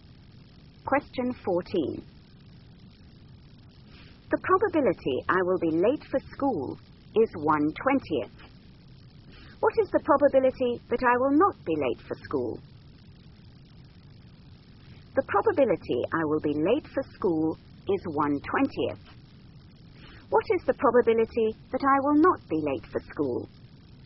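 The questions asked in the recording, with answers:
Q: What is the probability that I will not be late for school?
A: 19/20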